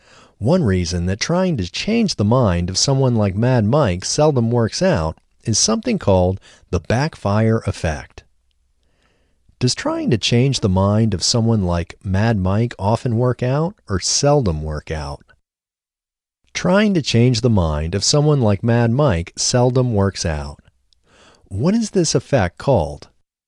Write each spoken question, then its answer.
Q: Does trying to change the mind of someone like Mad Mike often work out or seldom work out?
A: Trying to change the mind of someone like Mad Mike seldom works out.